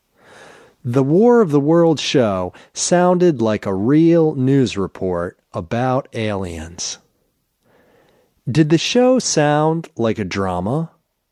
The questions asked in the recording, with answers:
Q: Did the show sound like a drama?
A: No, the show didn't sound like a drama.